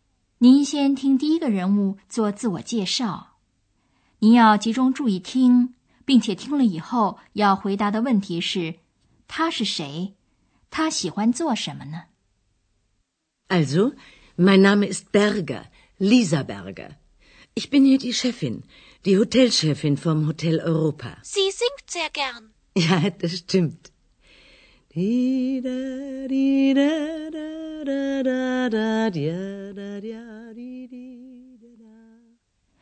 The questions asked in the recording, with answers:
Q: 他是谁,他喜欢做什么呢?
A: 原来这就是欧洲饭店的女老板 Berger 太太。